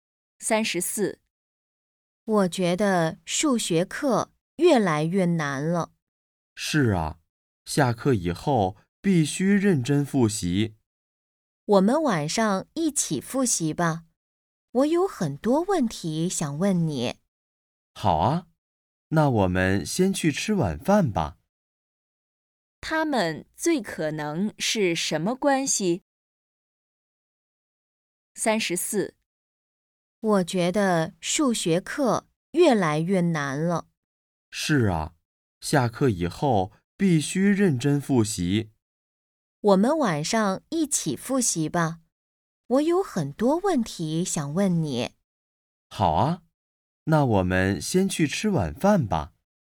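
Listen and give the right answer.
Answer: 同学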